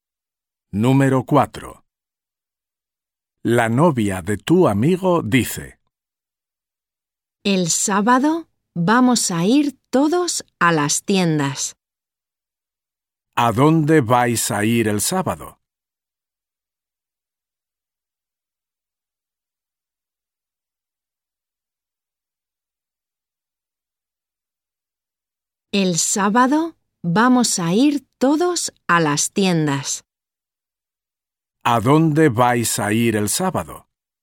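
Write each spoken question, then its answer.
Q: ¿A dónde vais a ir el sábado?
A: a las tiendas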